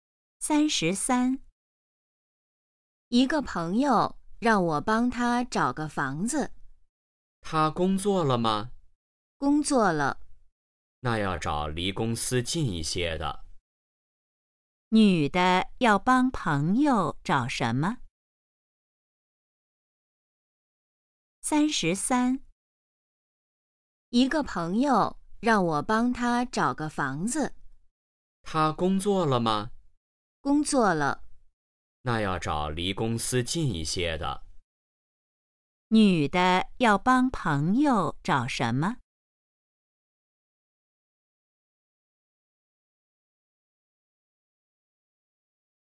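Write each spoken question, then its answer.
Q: 女的要帮朋友找什么?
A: 房子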